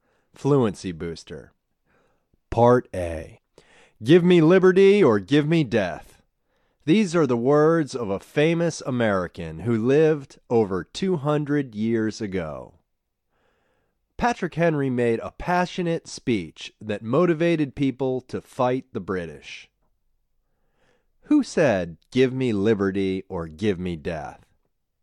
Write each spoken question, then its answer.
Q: Who said, "Give me liberty or give me death"?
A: Patrick Henry said, "Give me liberty or give me death."